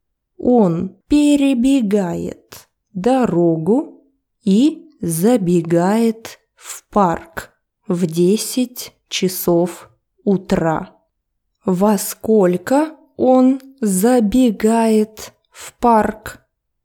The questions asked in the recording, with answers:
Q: Во сколько он забегает в парк?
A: В 10:00 утра.